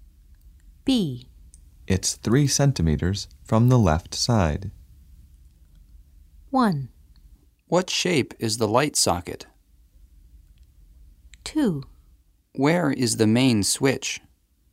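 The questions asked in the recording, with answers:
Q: It's 3 centimeters from the left side.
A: 2: Where is the main switch?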